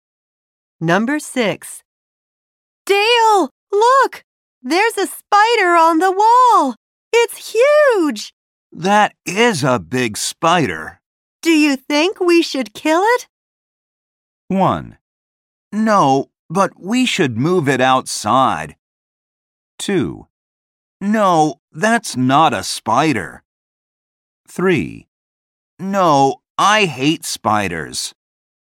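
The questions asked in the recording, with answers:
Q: Do you think we should kill it?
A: 1: No, but we should move it outside.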